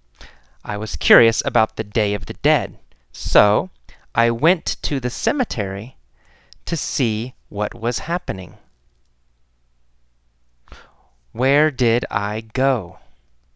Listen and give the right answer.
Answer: To the cemetery. I went to the cemetery.